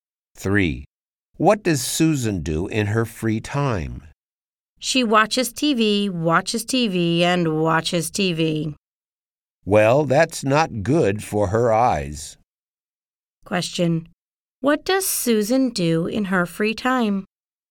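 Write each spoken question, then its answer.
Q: What does Susan do in her free time?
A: She watches TV.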